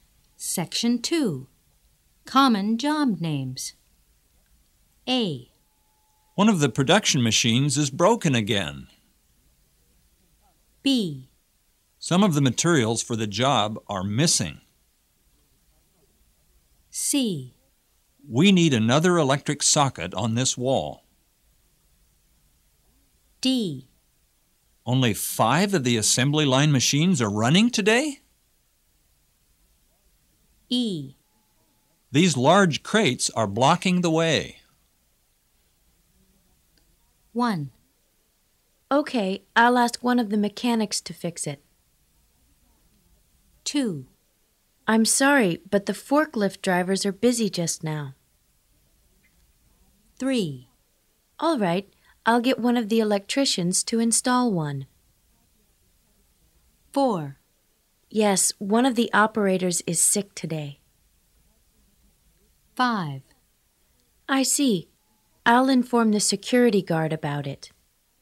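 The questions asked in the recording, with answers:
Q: Okay, I'll ask one of the mechanics to fix it.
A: A: One of the production machines is broken again.

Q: I'm sorry, but the forklift drivers are busy just now.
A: E: These large crates are blocking the way.

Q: All right, I'll get one of the electricians to install one.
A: C: We need another electric socket on this wall.

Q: Yes, one of the operators is sick today.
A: D: Only 5 of the assembly line machines are running today?

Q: I see. I'll inform the security guard about it.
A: B: Some of the materials for the job are missing.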